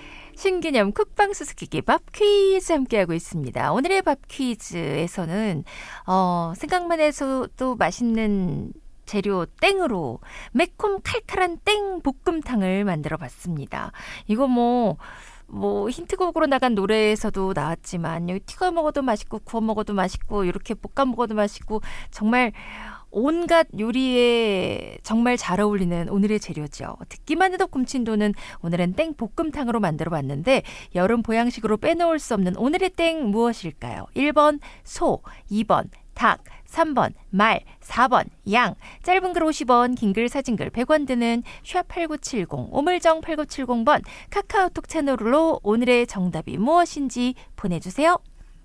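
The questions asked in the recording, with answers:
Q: 여름 보양식으로 빼놓을 수 없는 오늘의 땡 무엇일까요?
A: 2: 닭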